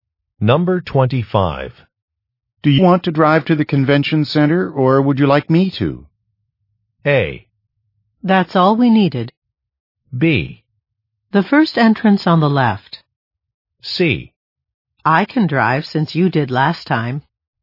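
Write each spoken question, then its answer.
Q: Do you want to drive to the convention center, or would you like me to?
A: C: I can drive since you did last time.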